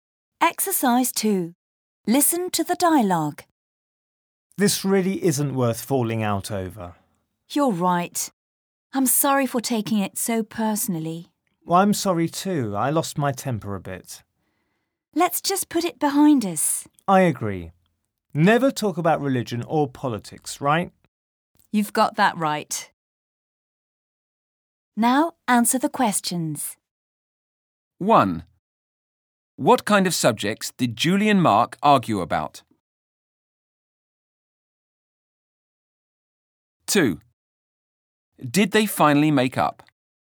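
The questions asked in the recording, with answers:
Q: What kind of subjects did Julie and Mark argue about?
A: Religion or politics

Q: Did they finally make up?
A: Yes, they apologized and put it behind them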